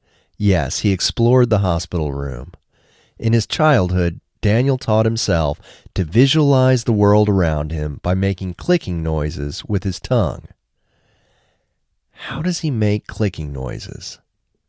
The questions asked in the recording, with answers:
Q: How does he make clicking noises?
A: He makes clicking noises with his tongue.